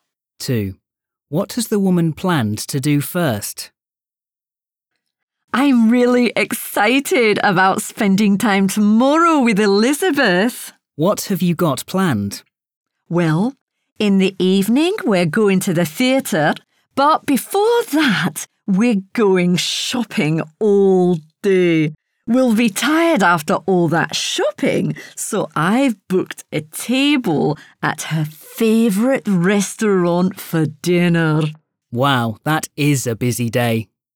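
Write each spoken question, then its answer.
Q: What has the woman planned to do first?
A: Go shopping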